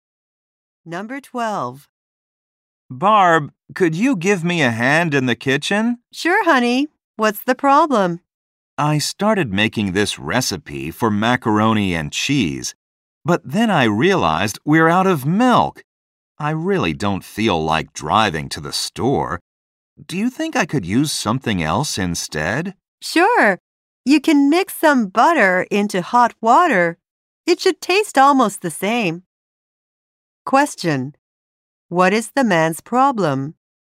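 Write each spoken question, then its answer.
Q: What is the man's problem?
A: They have no milk for the recipe.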